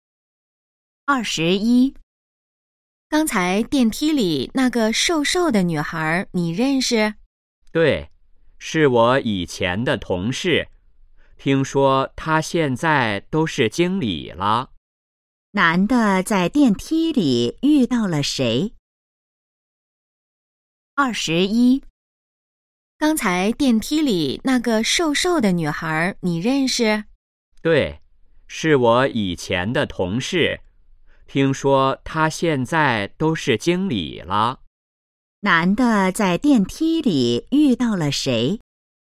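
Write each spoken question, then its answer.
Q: 男的在电梯里遇到了谁?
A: 以前的同事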